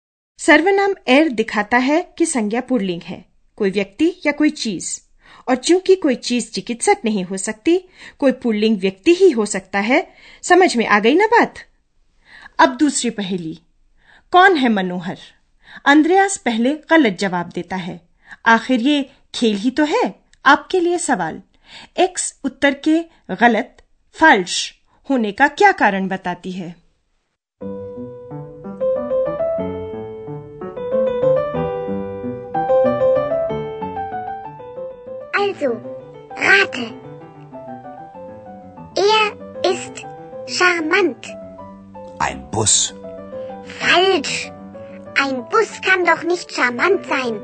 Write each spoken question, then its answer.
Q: आपके लिए सवाल x उत्तर के गलत फल्श होने का क्या कारण बताती है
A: एक बस कहीं मनोहर हो सकती है Ein Bus kann doch nicht charmant sein.